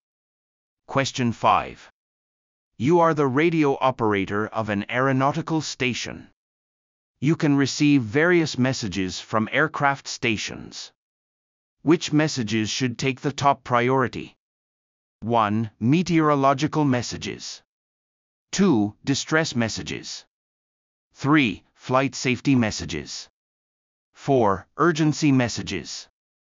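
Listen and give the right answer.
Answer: 2: Distress messages.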